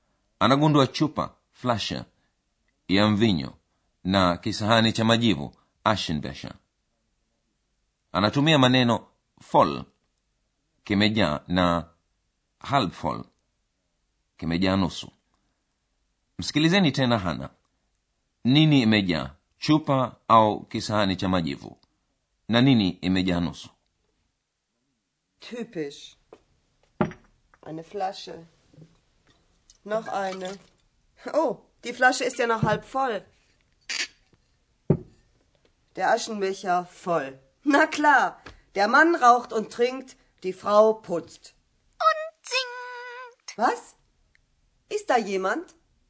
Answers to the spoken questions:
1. Hana anagundua kisahani cha majivu kilichojaa
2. na chupa iliyojaa nusu.